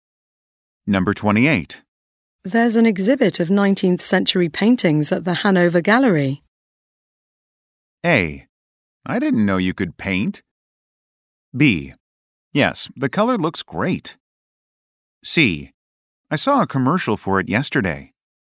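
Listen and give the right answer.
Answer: C: I saw a commercial for it yesterday.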